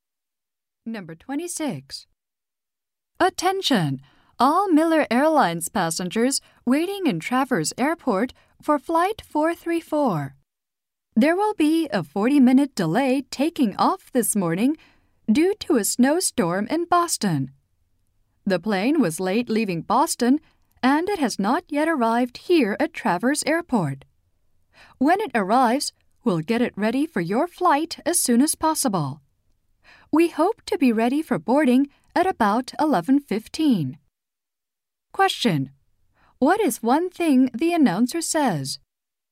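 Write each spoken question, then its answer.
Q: What is one thing the announcer says?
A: Flight 434 will be delayed 40 minutes because of a snowstorm in Boston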